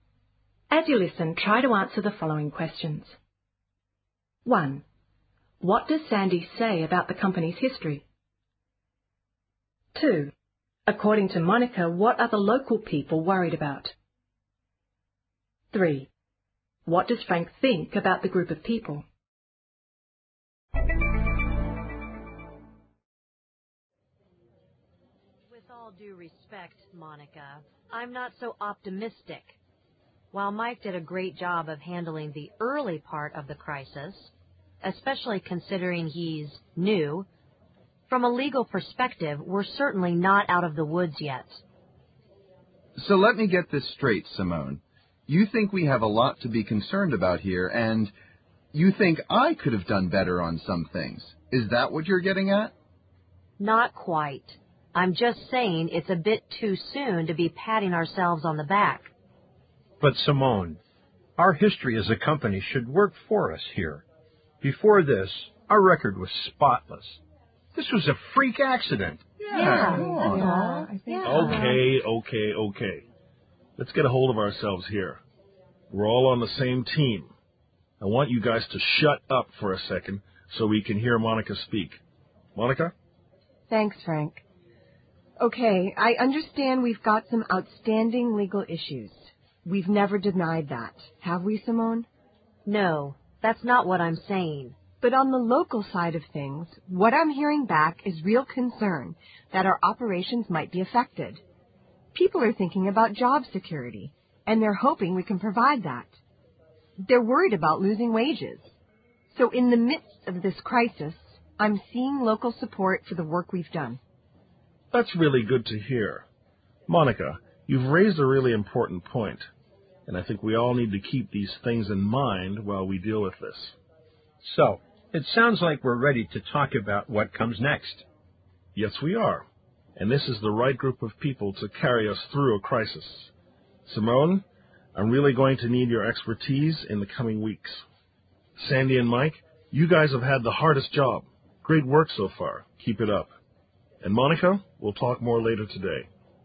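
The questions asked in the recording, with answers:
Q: What does Sandy say about the company's history?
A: It should work for them; their record was spotless before this freak accident.

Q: According to Monica, what are the local people worried about?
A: Job security and losing wages.

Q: What does Frank think about the group of people?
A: It is the right group of people to carry them through the crisis.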